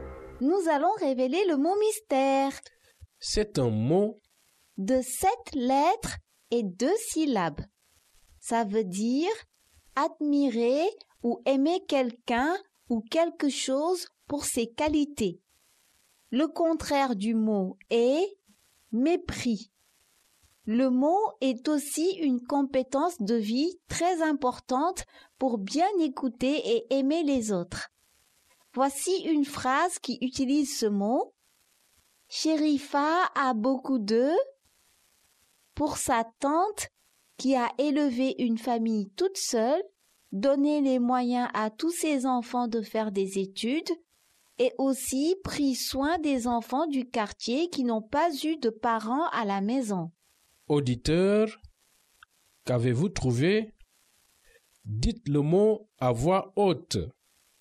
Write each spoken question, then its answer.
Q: Auditeur, qu'avez-vous trouvé?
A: Le mot mystère est respect.